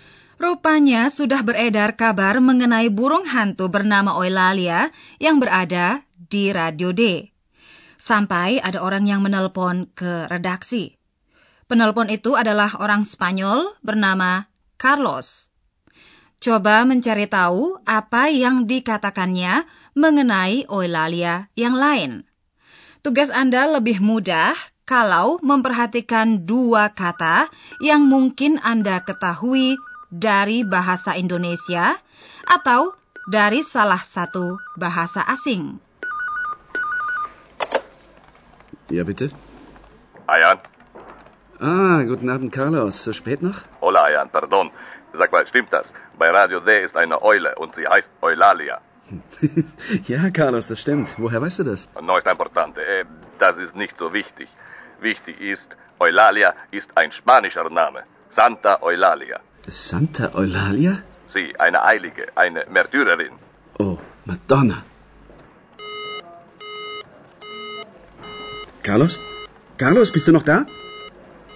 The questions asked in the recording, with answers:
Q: Coba mencari tahu apa yang dikatakannya mengenai Oilalia yang lain.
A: Ia berbicara mengenai Santa Eulalia orang kudus bernama Eulalia.